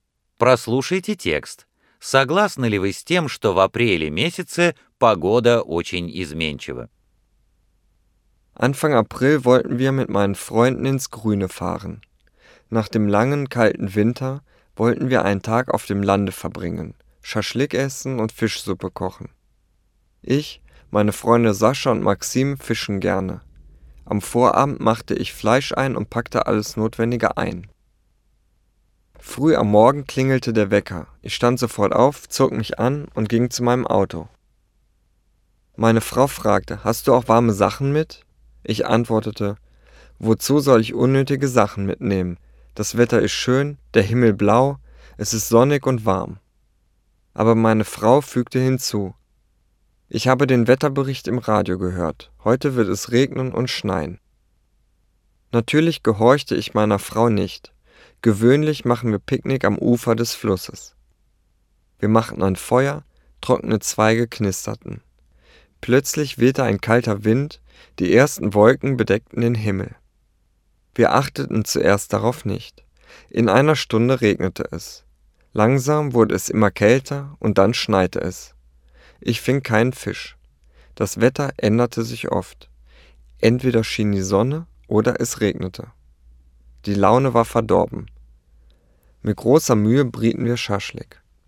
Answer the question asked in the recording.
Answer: Jetzt bin ich einverstanden.